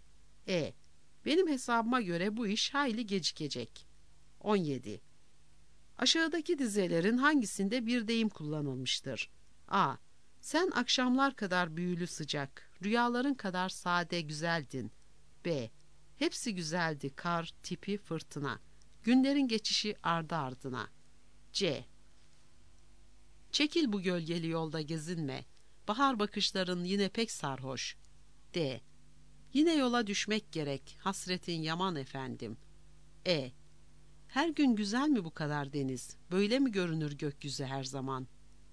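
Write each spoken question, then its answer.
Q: Aşağıdaki dizelerin hangisinde bir deyim kullanılmıştır?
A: D: Yine yola düşmek gerek, hasretin yaman efendim.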